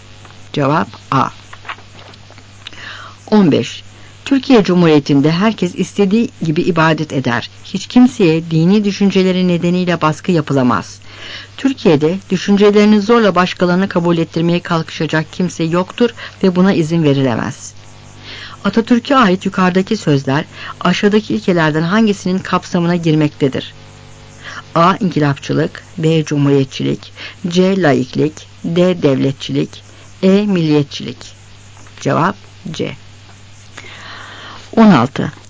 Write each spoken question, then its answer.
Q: Atatürk'e ait yukarıdaki sözler aşağıdaki ilkelerden hangisinin kapsamına girmektedir?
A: Cevap C.